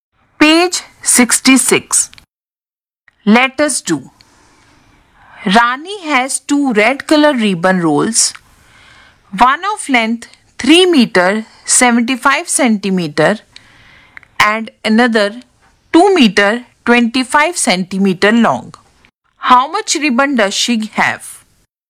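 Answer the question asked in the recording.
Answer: 6 meters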